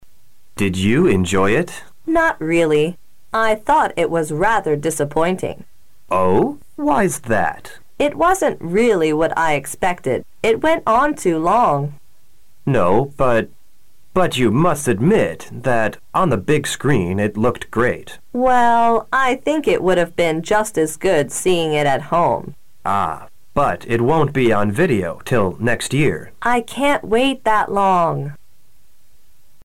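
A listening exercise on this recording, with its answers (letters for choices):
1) Two people are talking. What are they talking about?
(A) A TV programme.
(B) A film.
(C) A concert.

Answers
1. B

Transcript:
M: Did you enjoy it?
W: Not really. I thought it was rather disappointing.
W: It wasn't really what I expected. It went on too long.
M: No. But you must admit that on the big screen, it looked great.
W: Well, I think it would have been just as good seeing it at home.
M: Ah, But it won't be on video till next year.
W: I can't wait that long.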